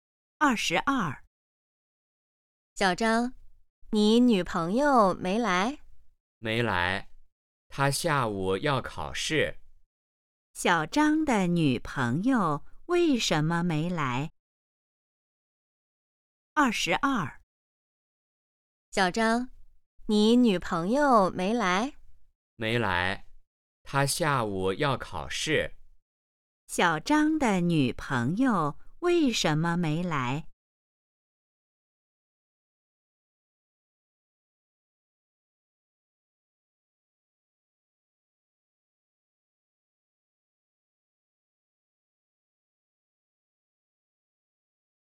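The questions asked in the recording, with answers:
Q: 小张的女朋友为什么没来?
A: 她下午要考试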